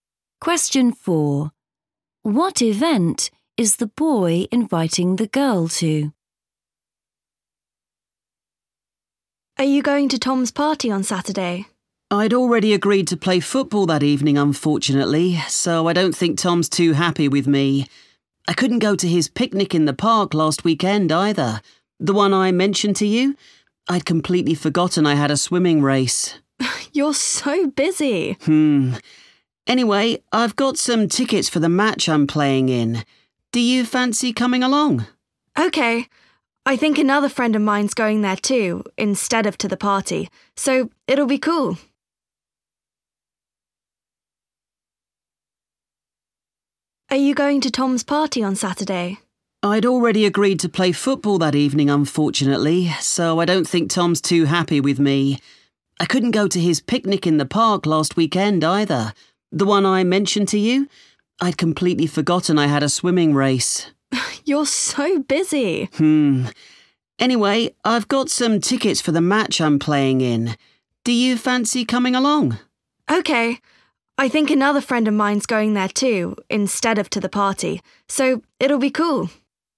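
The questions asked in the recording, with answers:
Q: What event is the boy inviting the girl to?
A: a football match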